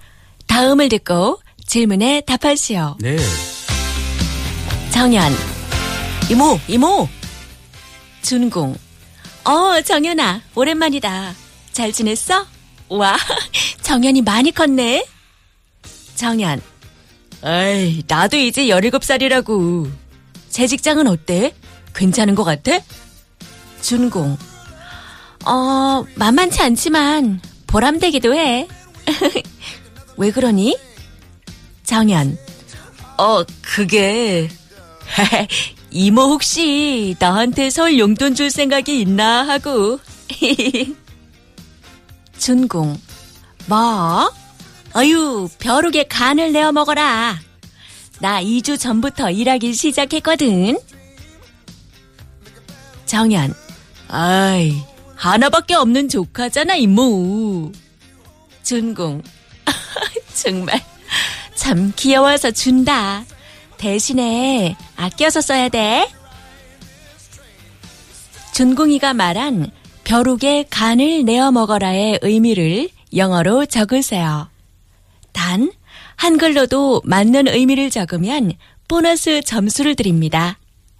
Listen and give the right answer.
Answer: 가난한 사람을 도와주기는 커녕 그 사람이 가지고 있는 것까지 빼앗는다.